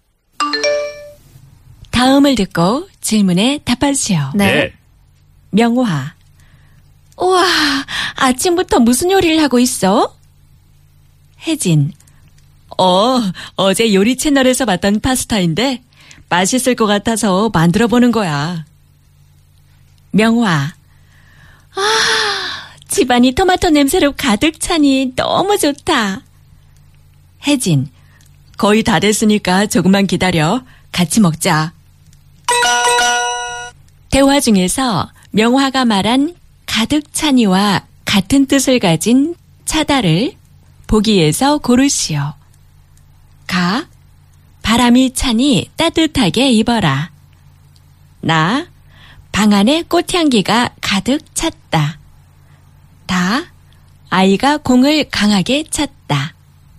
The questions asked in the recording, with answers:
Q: 대화 중에서 명화가 말한 가득 찬이와 같은 뜻을 가진 차다를 보기에서 고르시오.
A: Na. It was na.